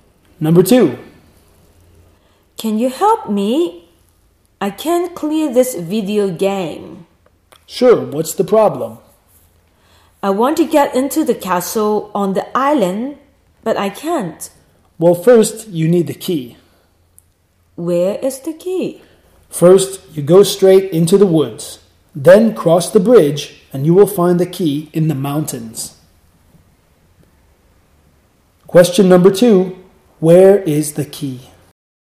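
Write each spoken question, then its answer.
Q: Question number two, where is the key?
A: In the mountains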